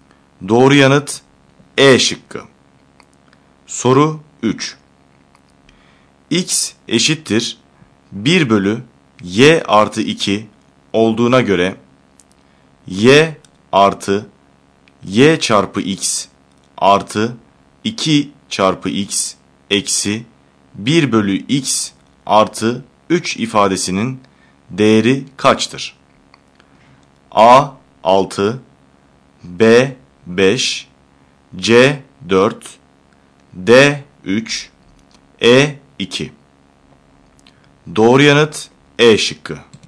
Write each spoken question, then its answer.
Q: X eşittir 1 bölü Y artı 2 olduğuna göre Y artı Y çarpı X artı 2 çarpı x eksi 1 bölü x artı 3 ifadesinin değeri kaçtır?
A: Doğru yanıt E şıkkı.